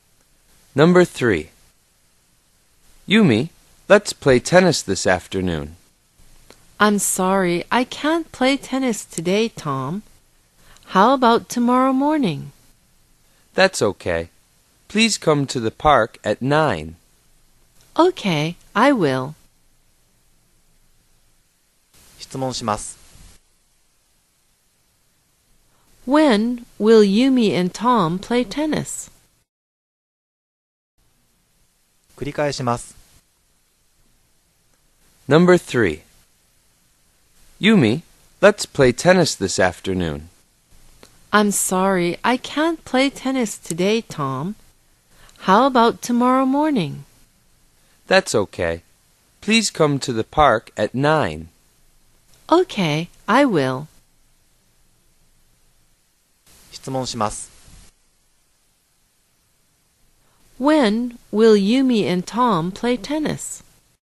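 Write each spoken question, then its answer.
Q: When will Yumi and Tom play tennis?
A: Tomorrow morning at 9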